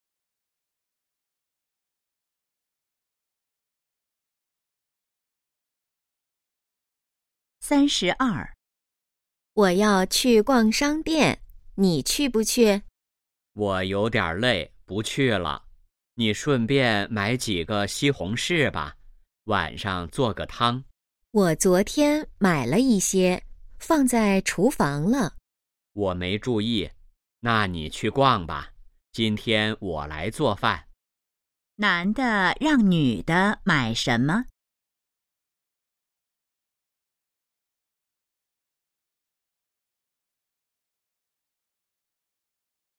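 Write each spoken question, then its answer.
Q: 男的让女的买什么?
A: 西红柿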